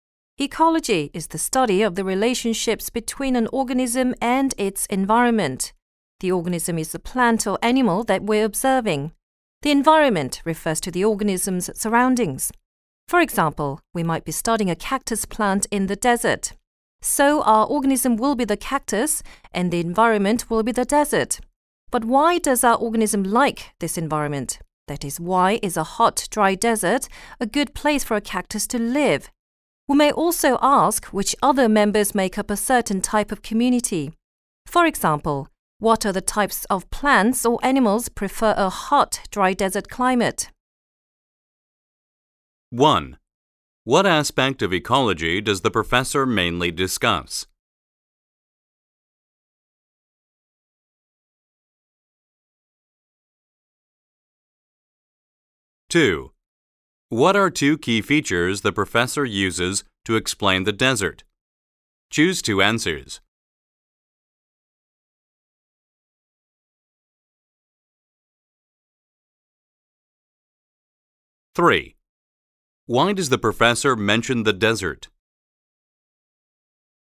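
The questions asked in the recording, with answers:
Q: What are two key features the professor uses to explain the desert?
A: It is hot and dry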